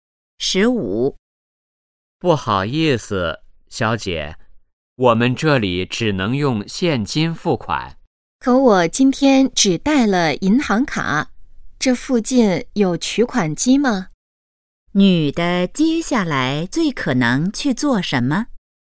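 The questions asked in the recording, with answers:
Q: 女的接下来最可能去做什么?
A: 去取款机取钱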